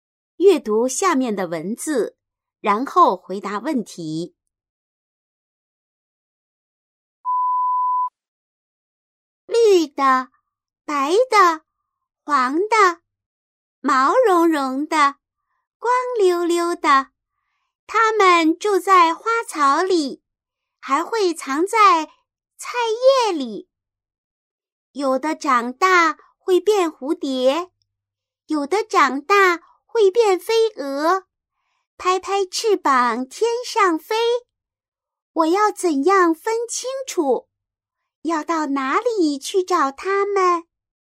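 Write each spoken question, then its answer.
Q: 要到哪里去找它们?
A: 在花草里和菜叶里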